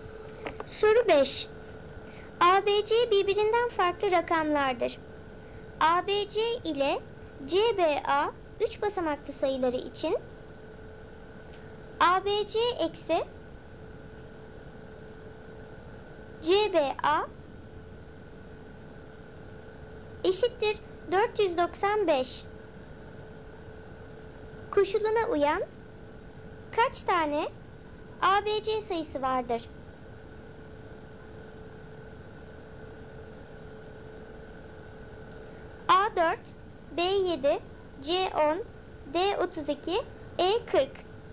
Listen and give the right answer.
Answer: Doğru cevap D32.